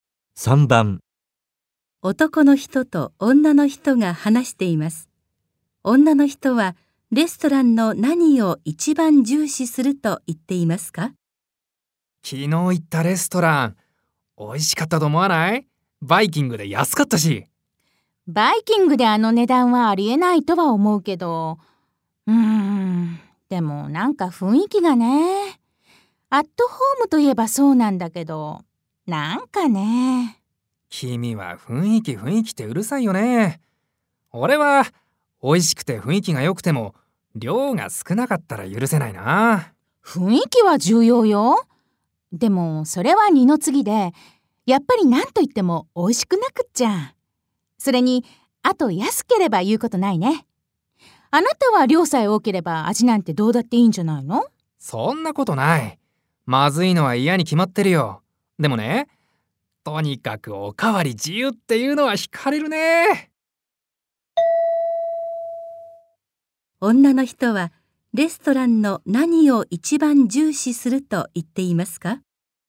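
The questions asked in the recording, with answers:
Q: 女の人はレストランの何を一番重視すると言っていますか?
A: 味(美味しいこと)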